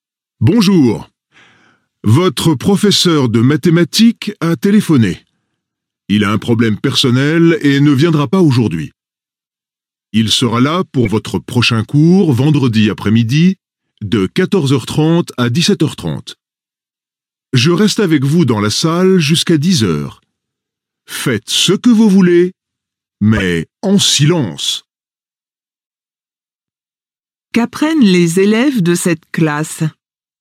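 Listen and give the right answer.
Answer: Les mathématiques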